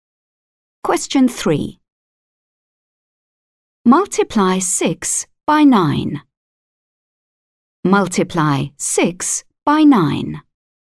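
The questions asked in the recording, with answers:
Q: Multiply 6 by 9.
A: 54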